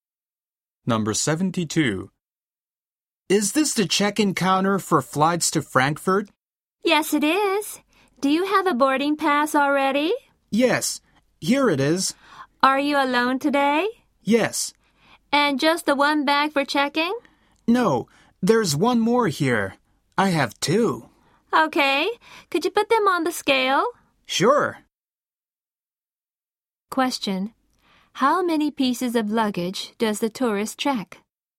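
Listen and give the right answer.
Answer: Two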